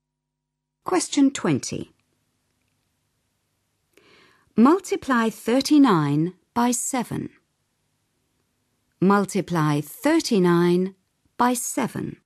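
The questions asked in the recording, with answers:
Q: Multiply 39 by 7.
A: 273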